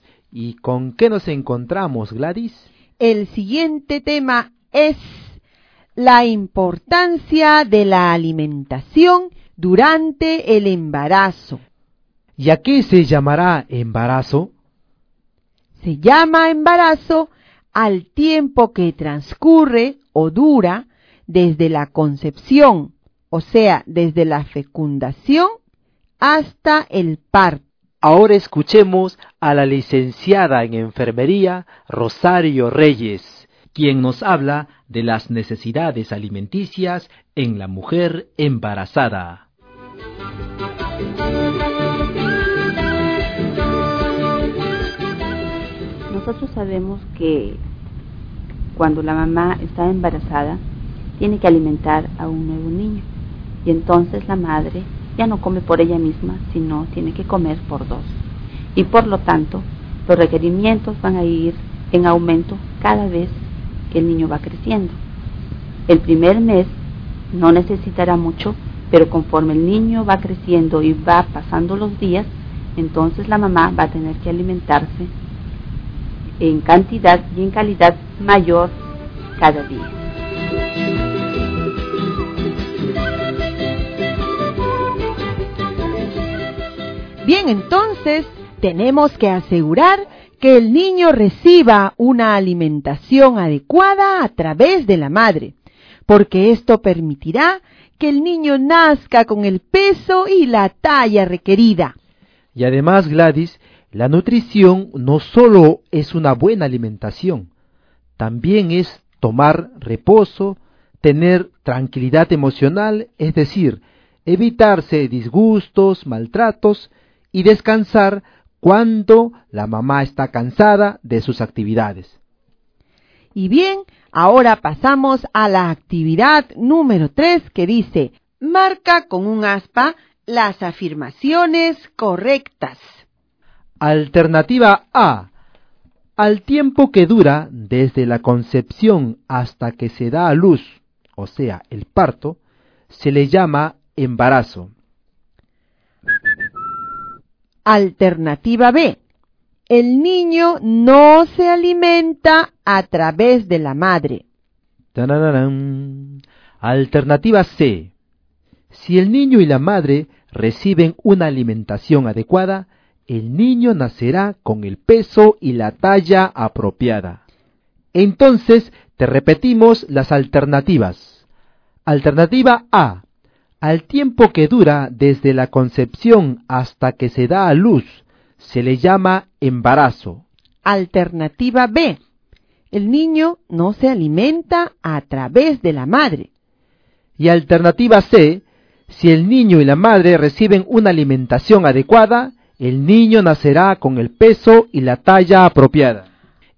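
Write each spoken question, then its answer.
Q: marca con un aspa las afirmaciones correctas.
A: A y C: el tiempo desde la concepción hasta el parto se llama embarazo; con alimentación adecuada el niño nacerá con el peso y la talla apropiada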